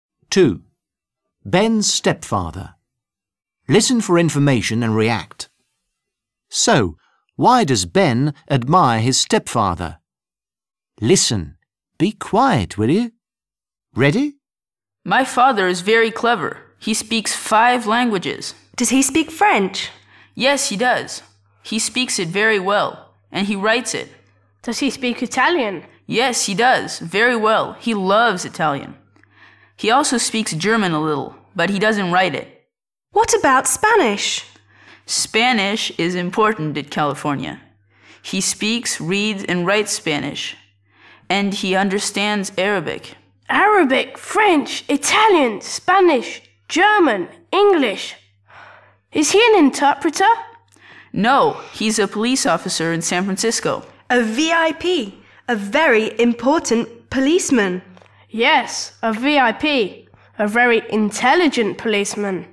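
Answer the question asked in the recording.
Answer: Because he is very clever and speaks many languages.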